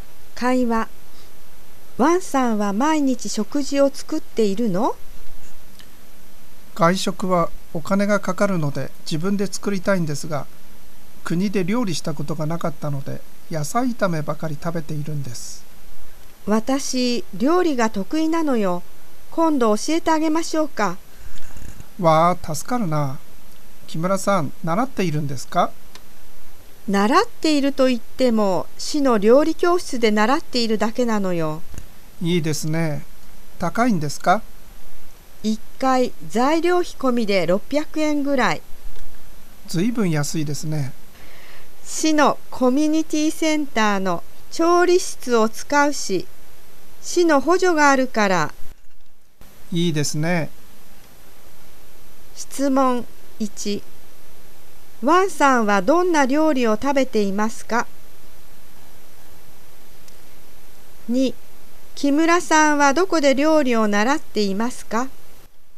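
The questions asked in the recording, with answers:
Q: ワンさんはどんな料理を食べていますか?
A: 野菜炒めばかり

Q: 木村さんはどこで料理を習っていますか?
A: 市の料理教室(市のコミュニティセンターの調理室)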